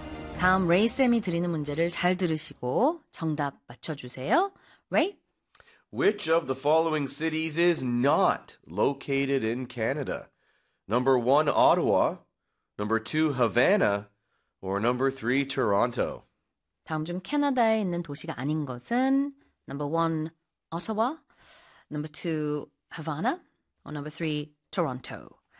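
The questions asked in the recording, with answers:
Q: Which of the following cities is not located in Canada?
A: 2: Havana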